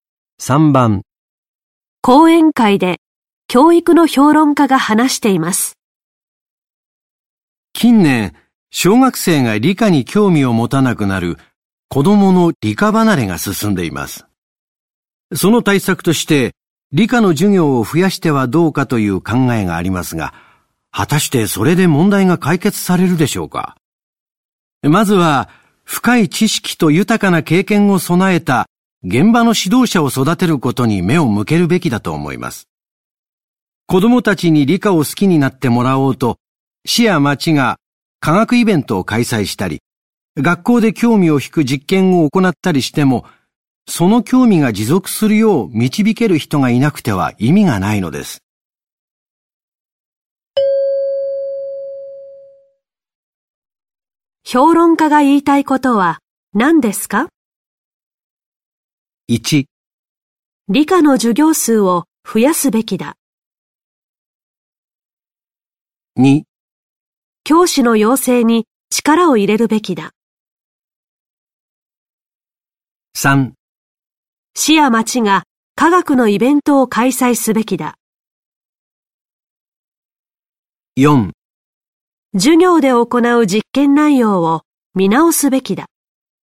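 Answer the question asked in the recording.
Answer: 2: 教師の養成に力を入れるべきだ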